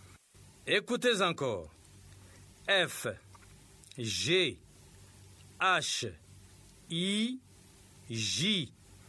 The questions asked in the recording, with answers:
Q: F, G, H, I, J.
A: J'espère que les élèves ont écrit K.